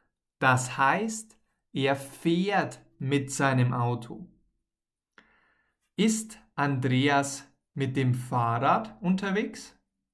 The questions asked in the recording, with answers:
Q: Ist Andreas mit dem Fahrrad unterwegs?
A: Nein, mm -mm. er ist nicht mit dem Fahrrad unterwegs.